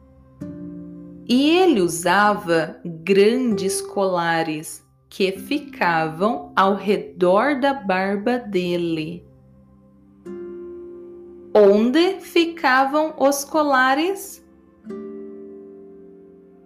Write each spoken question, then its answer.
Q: Onde ficavam os colares?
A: Ao redor da barba dele.